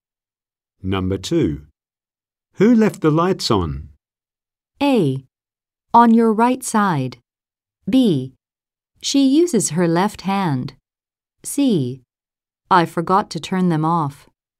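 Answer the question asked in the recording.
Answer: C: I forgot to turn them off.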